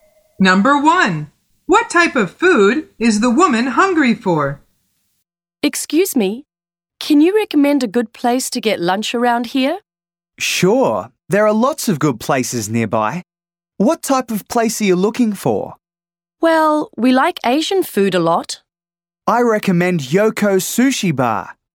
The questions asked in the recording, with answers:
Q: What type of food is the woman hungry for?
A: The answer is Asian food.